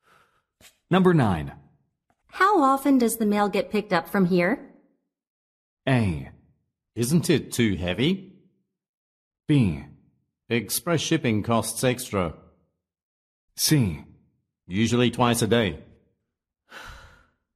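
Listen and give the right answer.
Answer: C: Usually twice a day.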